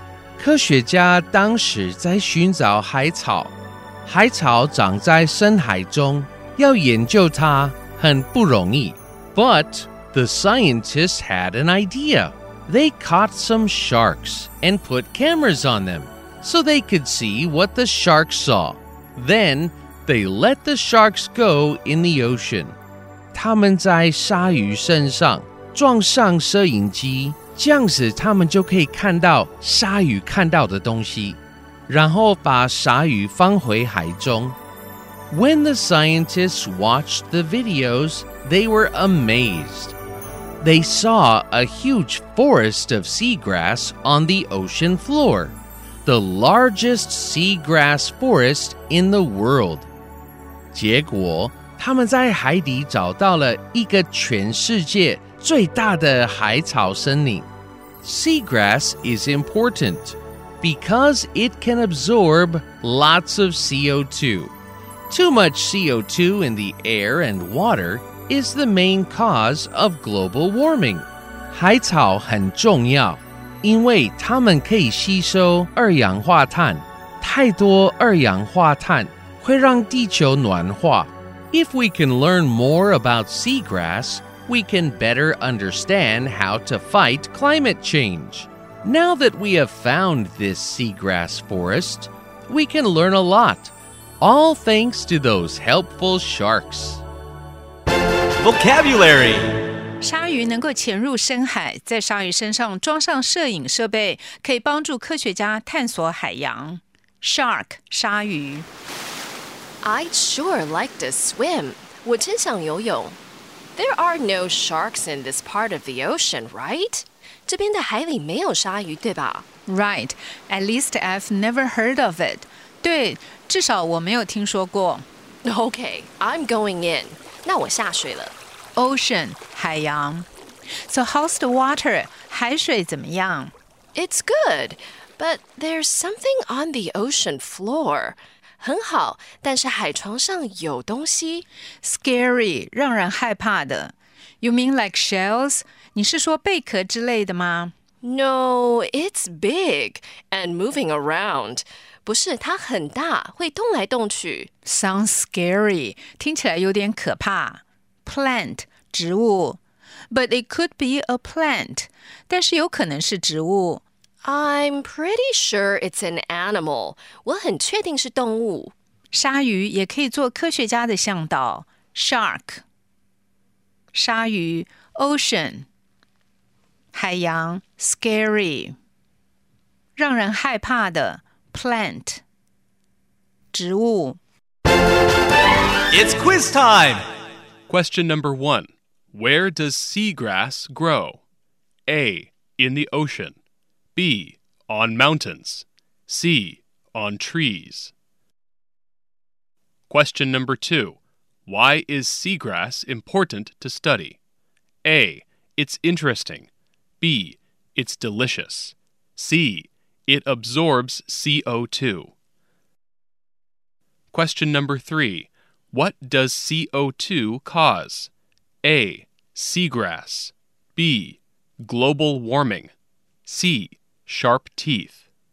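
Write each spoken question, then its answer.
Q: Where does seagrass grow?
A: A: In the ocean.

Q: Why is seagrass important to study?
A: C: It absorbs CO2.

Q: What does CO2 cause?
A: B: Global warming.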